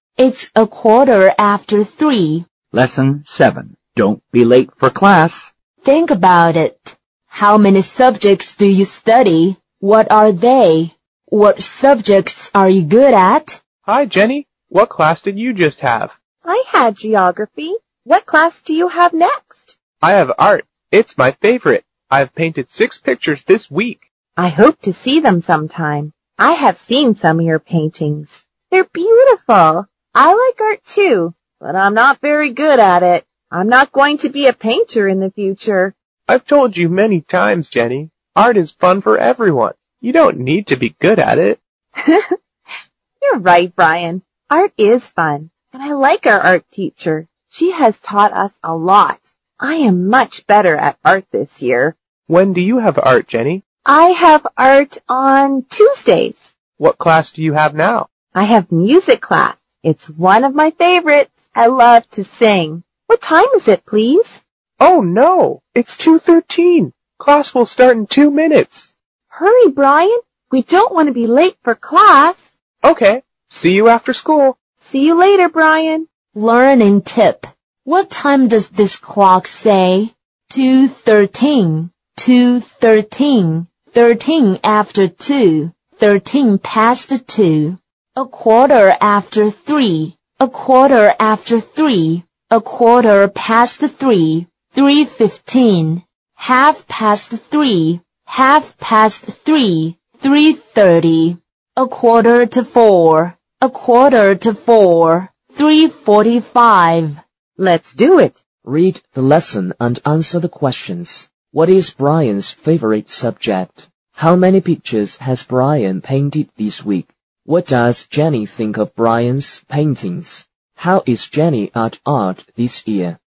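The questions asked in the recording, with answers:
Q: What is Brian's favorite subject?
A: Art

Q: How many pictures has Brian painted this week?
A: Six

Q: What does Jenny think of Brian's paintings?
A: She thinks they're beautiful

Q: How is Jenny at art this year?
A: She is much better at art this year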